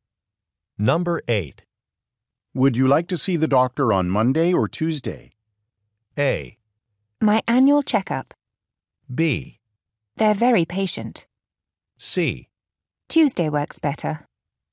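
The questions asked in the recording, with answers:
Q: Would you like to see the doctor on Monday or Tuesday?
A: C: Tuesday works better.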